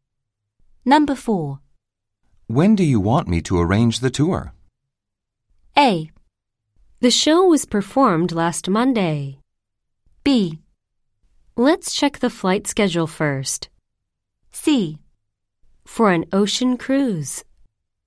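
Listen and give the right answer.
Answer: B: Let's check the flight schedule first.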